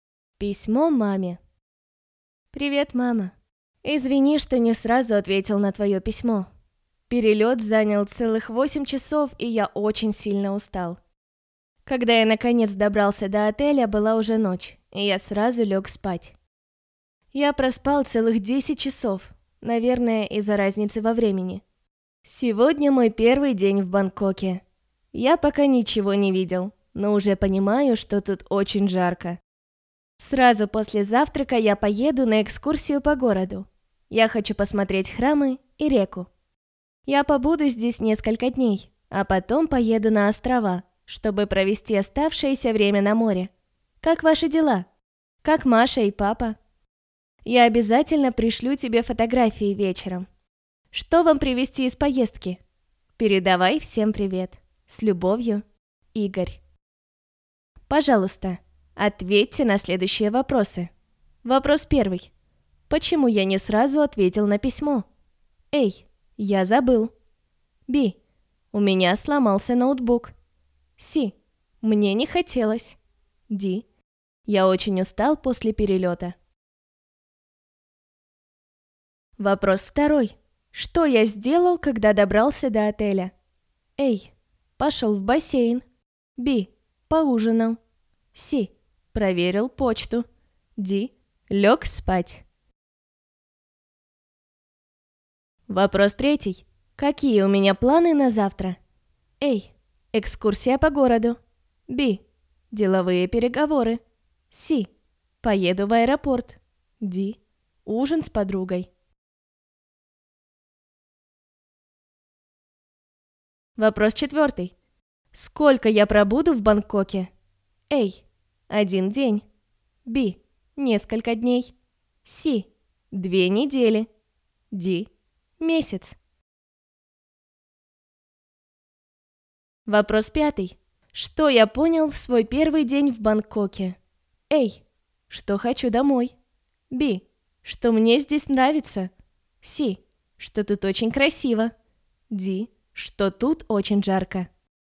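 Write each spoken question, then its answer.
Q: Почему я не сразу ответил на письмо?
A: D: я очень устал после перелета

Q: Что я сделал, когда добрался до отеля?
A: D: лег спать

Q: Сколько я пробуду в Бангкоке?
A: B: несколько дней

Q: Что я понял в свой первый день в Бангкоке?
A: D: что тут очень жарко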